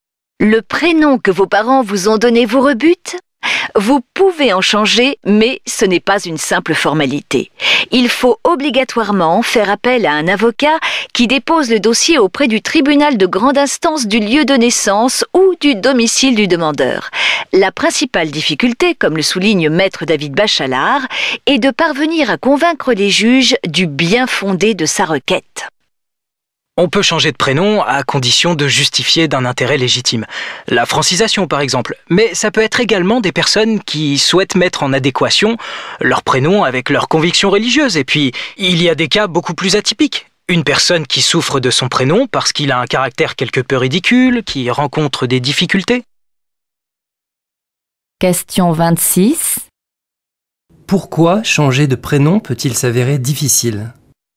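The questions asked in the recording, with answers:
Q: Pourquoi changer de prénom peut-il s'avérer difficile ?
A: Il faut convaincre les juges du bien-fondé de sa requête (justifier d'un intérêt légitime).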